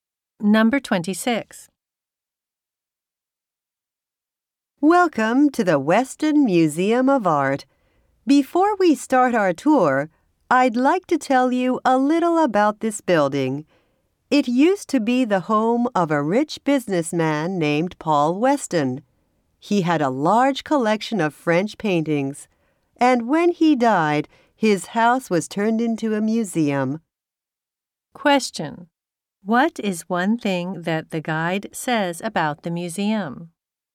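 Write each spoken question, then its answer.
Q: What is one thing that the guide says about the museum?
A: It used to be the home of a rich businessman, Paul Weston.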